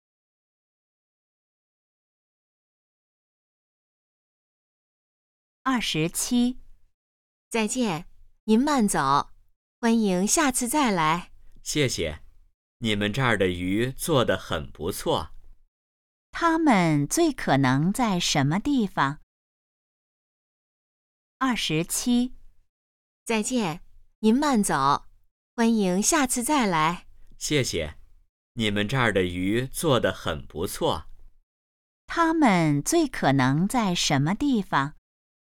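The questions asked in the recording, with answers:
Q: 他们最可能在什么地方?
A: 饭馆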